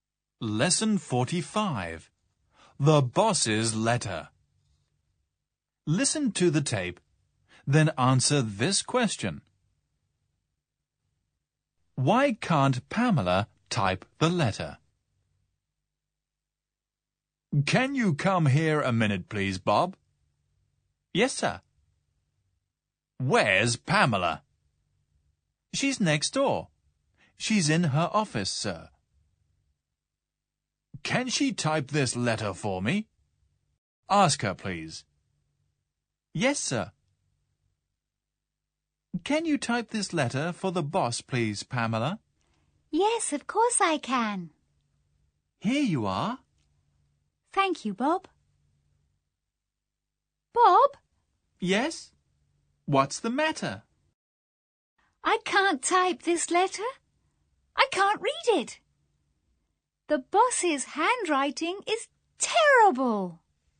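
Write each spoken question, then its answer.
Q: Why can't Pamela type the letter?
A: Because she can't read it; the boss's handwriting is terrible.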